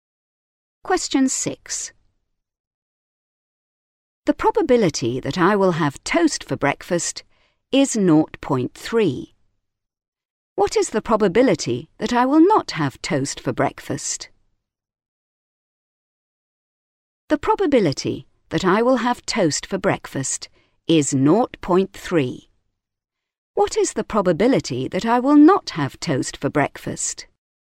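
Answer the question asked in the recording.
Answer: 0.7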